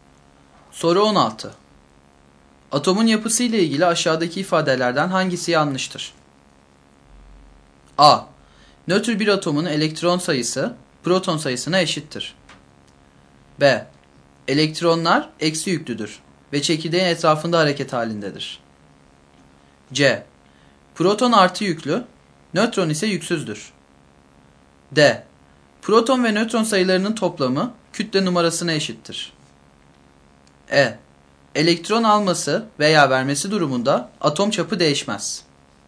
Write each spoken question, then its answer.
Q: Atomun yapısı ile ilgili aşağıdaki ifadelerden hangisi yanlıştır?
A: Doğru yanıt E şıkkı.